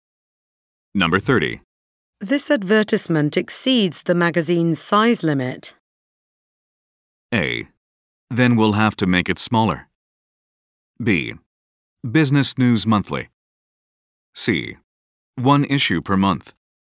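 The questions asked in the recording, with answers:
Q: This advertisement exceeds the magazine's size limit.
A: A: Then we'll have to make it smaller.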